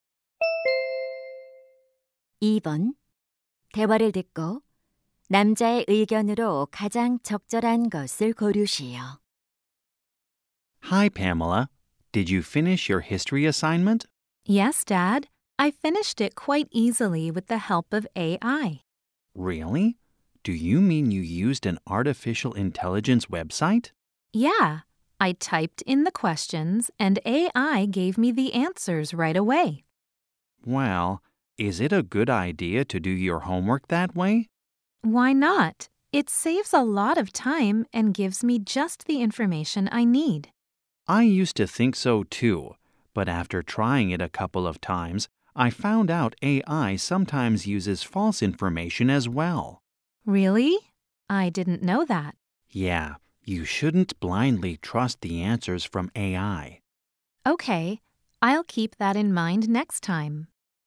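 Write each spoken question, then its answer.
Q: 대화를 듣고 남자의 의견으로 가장 적절한 것을 고르시오.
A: AI가 주는 답을 맹목적으로 믿으면 안 된다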